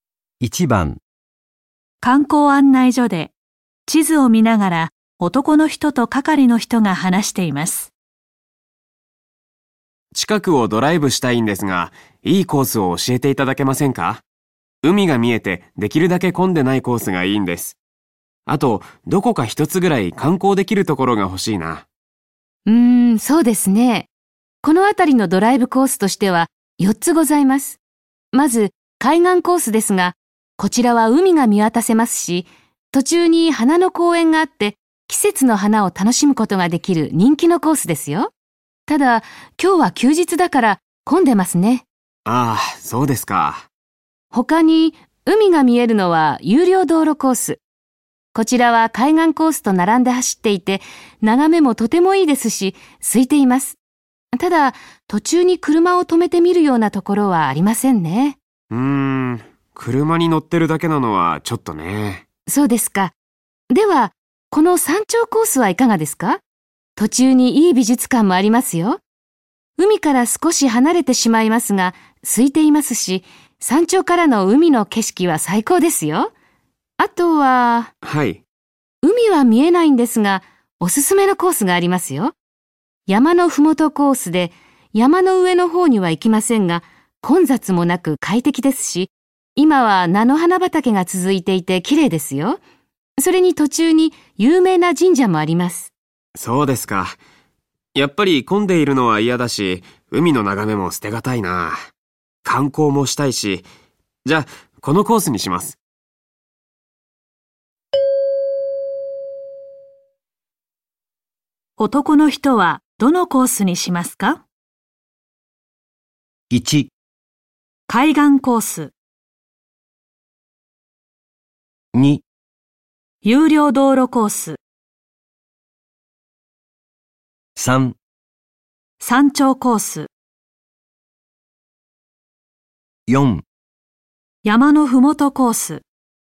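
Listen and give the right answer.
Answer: 3: 山頂コース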